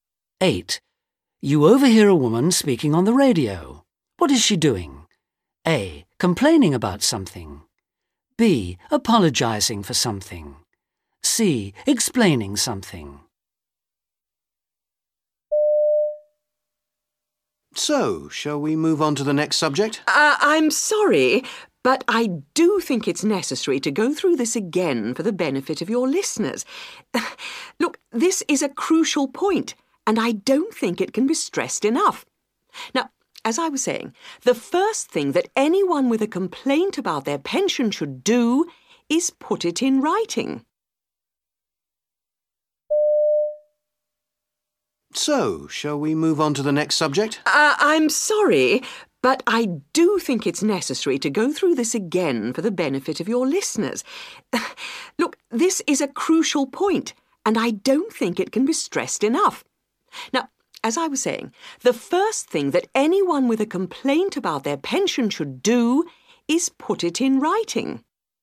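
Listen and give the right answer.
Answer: C: Explaining something.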